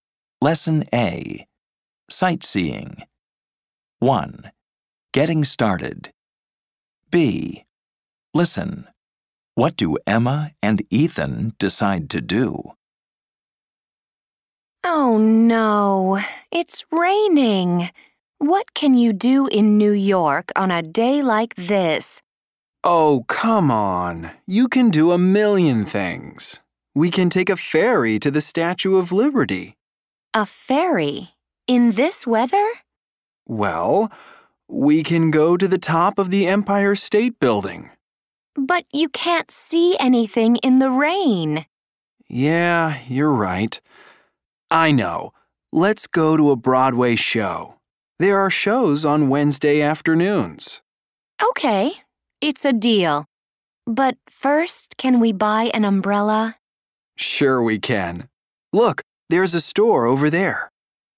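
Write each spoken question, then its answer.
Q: What do Emma and Ethan decide to do?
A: Go to a Broadway show (after buying an umbrella)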